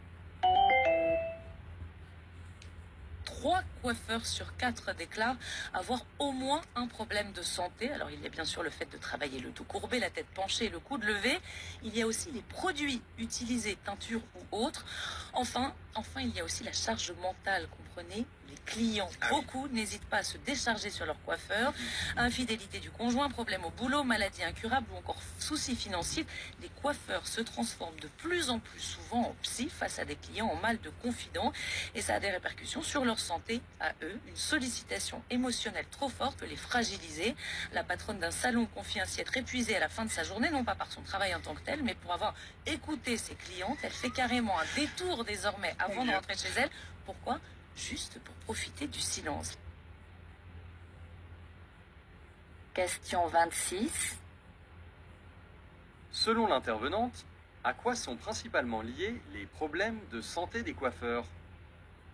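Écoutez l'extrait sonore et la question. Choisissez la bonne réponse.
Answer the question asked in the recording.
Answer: À la charge mentale due aux confidences des clients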